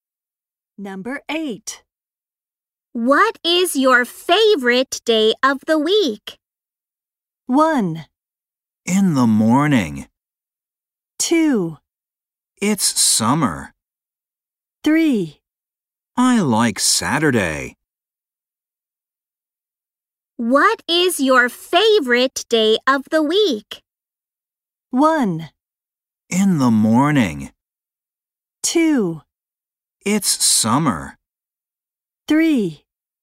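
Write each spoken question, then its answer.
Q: What is your favorite day of the week?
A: 3: I like Saturday.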